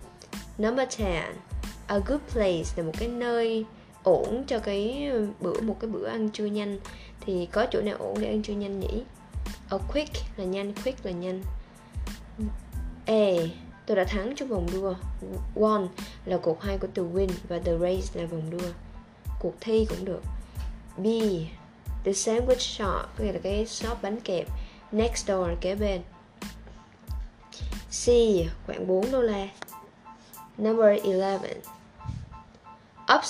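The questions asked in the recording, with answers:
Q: Thì có chỗ nào ổn để ăn trưa nhanh nhỉ?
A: B: The sandwich shop next door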